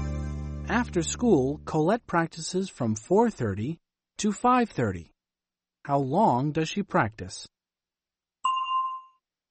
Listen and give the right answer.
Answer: For an hour. She practices for an hour.